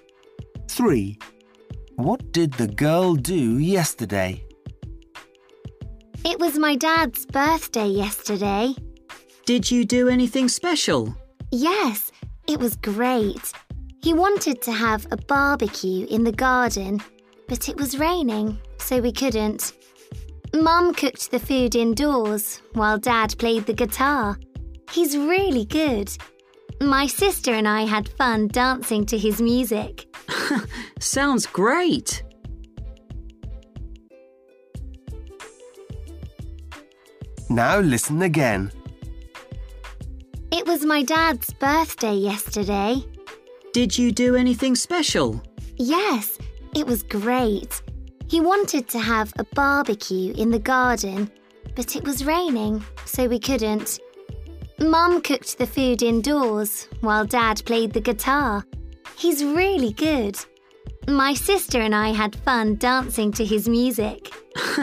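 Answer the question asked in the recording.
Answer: danced to her dad's guitar music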